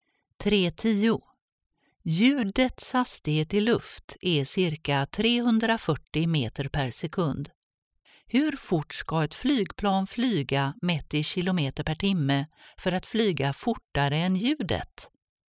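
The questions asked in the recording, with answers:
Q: Hur fort ska ett flygplan flyga mätt i kilometer per timme för att flyga fortare än ljudet?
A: mer än ca 1224 km/h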